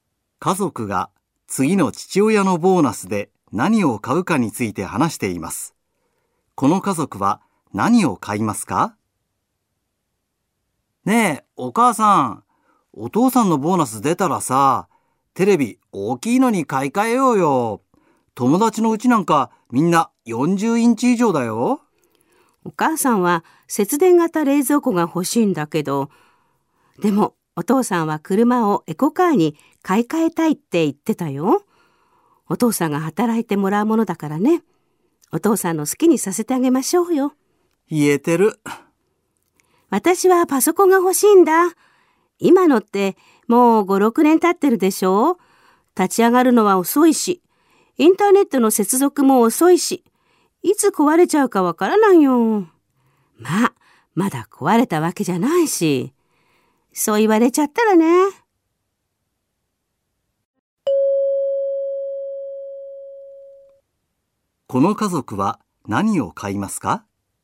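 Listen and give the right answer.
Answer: エコカー(車)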